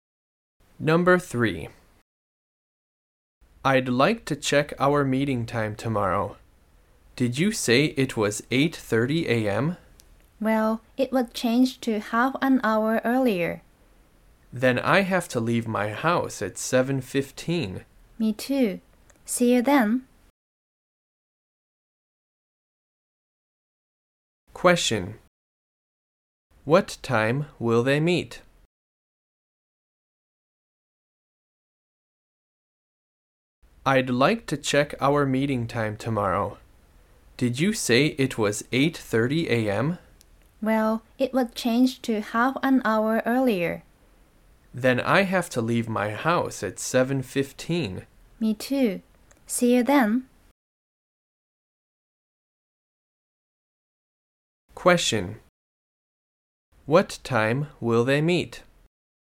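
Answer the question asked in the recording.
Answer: At 8:00 a.m.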